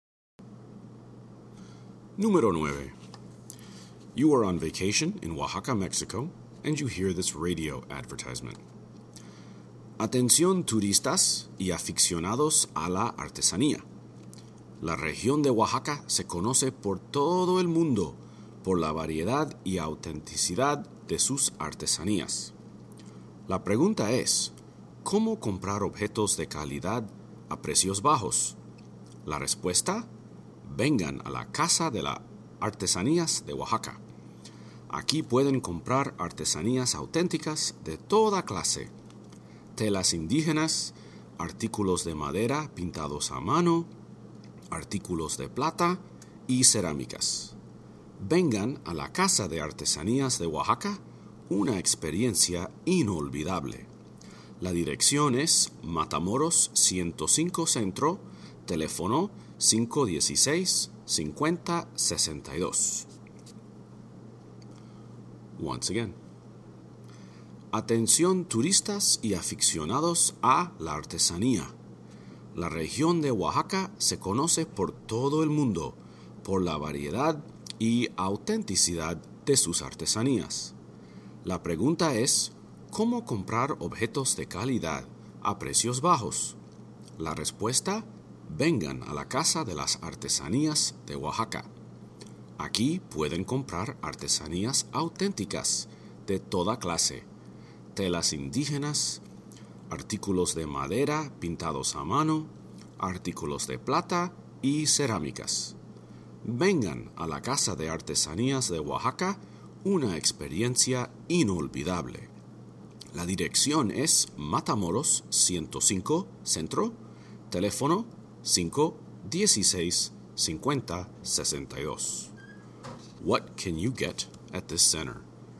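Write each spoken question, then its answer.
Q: What can you get at this center?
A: Authentic handicrafts at low prices (indigenous fabrics, hand-painted wood items, silver, ceramics)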